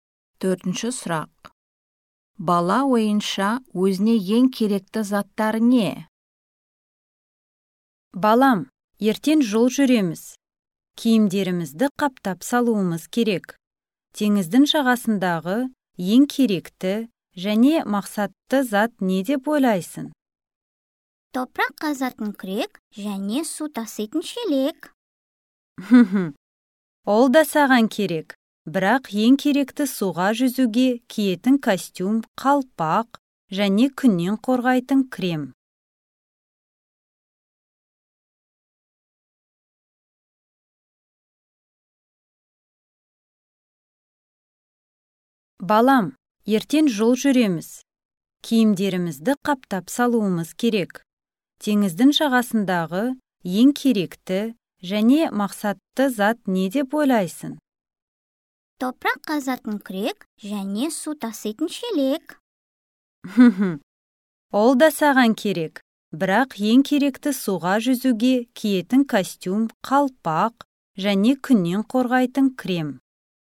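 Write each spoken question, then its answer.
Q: Бала ойынша өзіне ең керекті заттар не?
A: Топырақ қазатын күрек және су тасыйтын шелек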